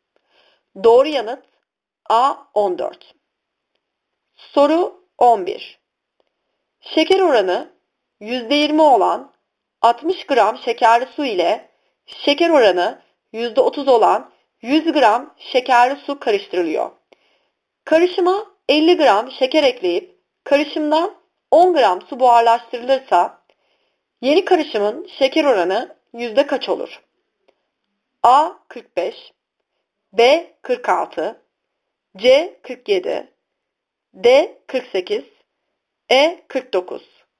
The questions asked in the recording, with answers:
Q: Karışıma 50 gram şeker ekleyip karışımdan 10 gram su buharlaştırılırsa yeni karışımın şeker oranı yüzde kaç olur?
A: Doğru yanıt B 46.